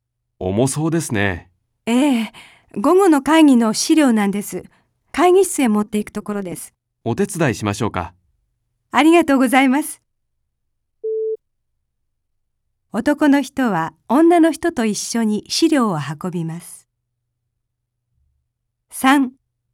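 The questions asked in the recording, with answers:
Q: 男の人は女の人と一緒に資料を運びます。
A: ○(正しい)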